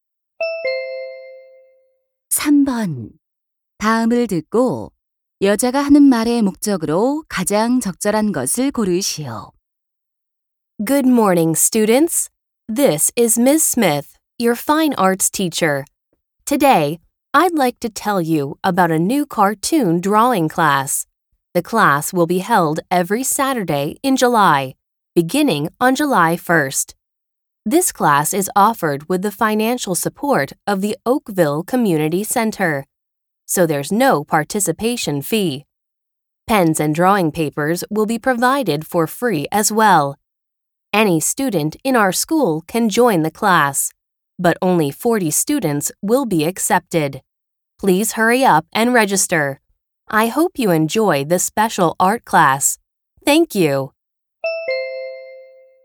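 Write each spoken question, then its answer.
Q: 다음을 듣고 여자가 하는 말의 목적으로 가장 적절한 것을 고르시오.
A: 새 만화 그리기 수업을 홍보하고 등록을 권하려고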